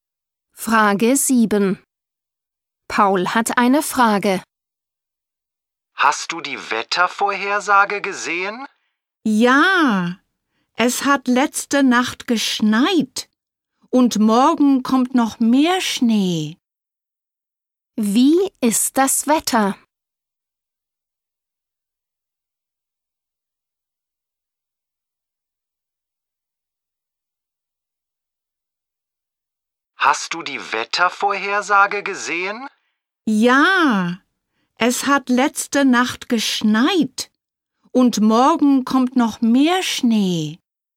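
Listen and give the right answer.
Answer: Es schneit (Schnee)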